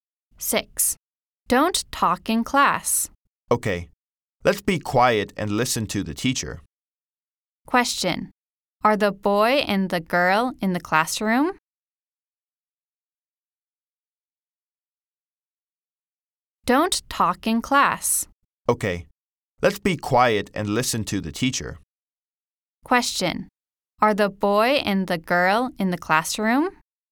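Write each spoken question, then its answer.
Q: Are the boy and the girl in the classroom?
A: Yes, they are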